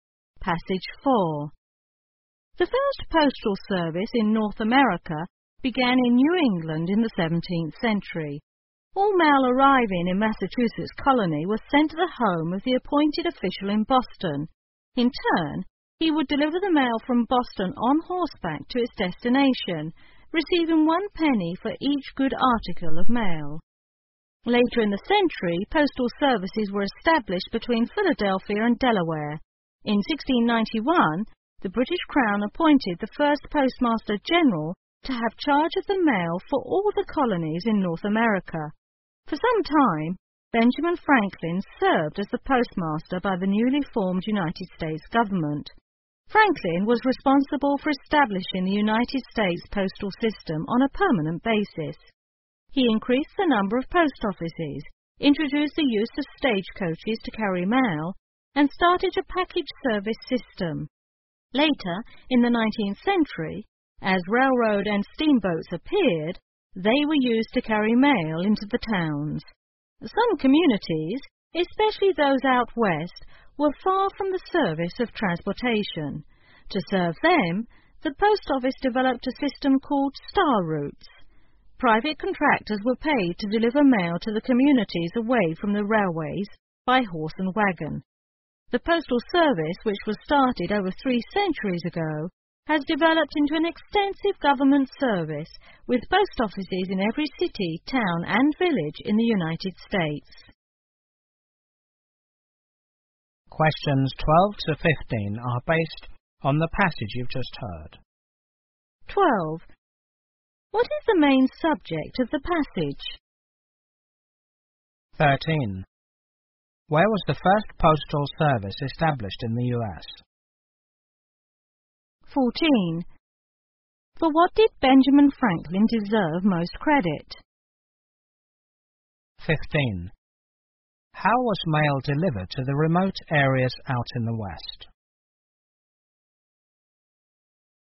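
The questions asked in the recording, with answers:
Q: What is the main subject of the passage?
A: The history of the postal service in North America

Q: Where was the first postal service established in the U.S.?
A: In New England

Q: For what did Benjamin Franklin deserve most credit?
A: Establishing the U.S. postal system on a permanent basis

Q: How was mail delivered to the remote areas out in the West?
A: By private contractors, by horse and wagon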